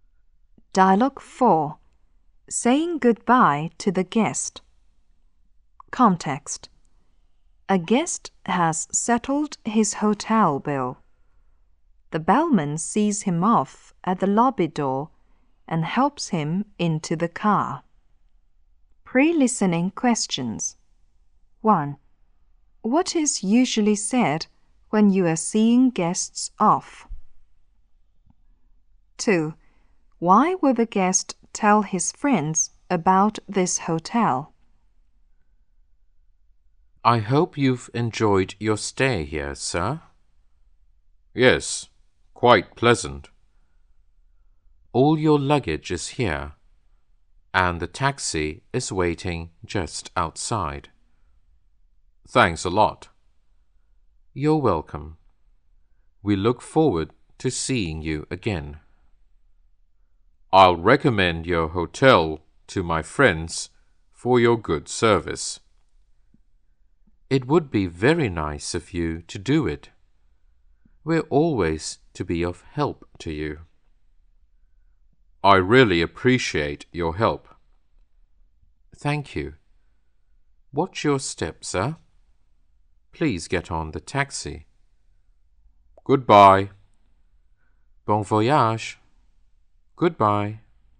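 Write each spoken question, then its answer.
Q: What is usually said when you are seeing guests off?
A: I hope you've enjoyed your stay; we look forward to seeing you again; bon voyage.

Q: Why would the guest tell his friends about this hotel?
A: Because of its good service.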